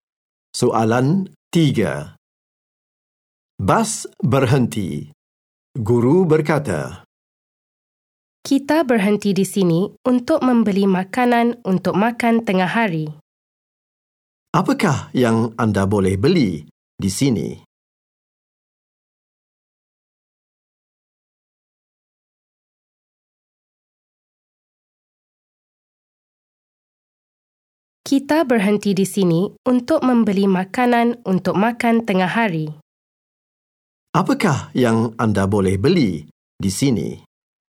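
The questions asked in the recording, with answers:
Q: Apakah yang anda boleh beli di sini?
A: Makanan untuk makan tengah hari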